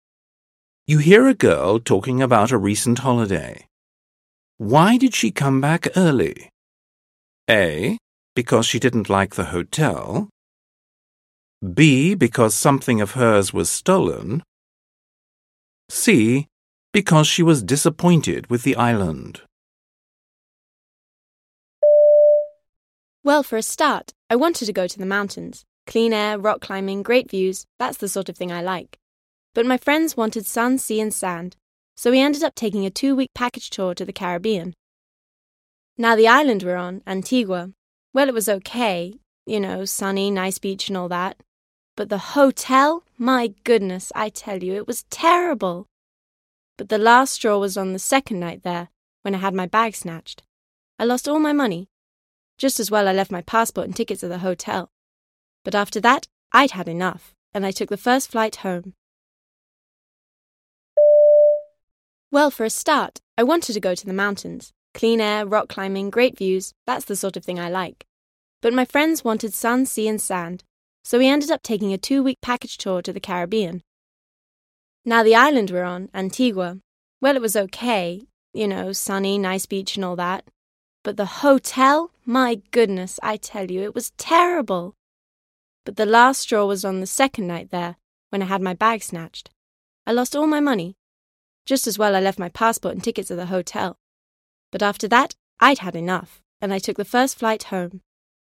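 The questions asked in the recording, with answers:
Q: Why did she come back early?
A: B: Because something of hers was stolen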